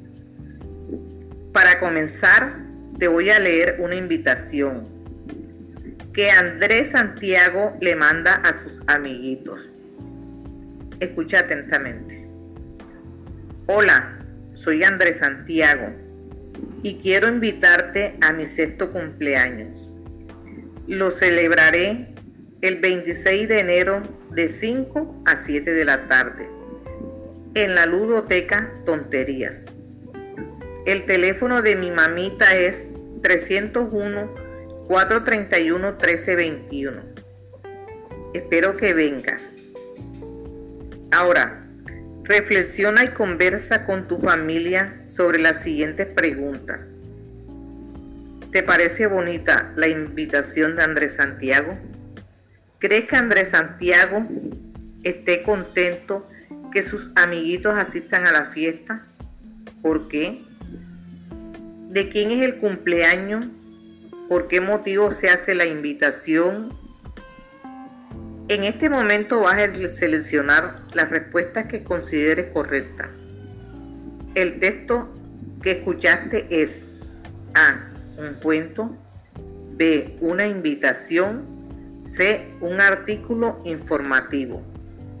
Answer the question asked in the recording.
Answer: Si seleccionaste la B, felicitaciones.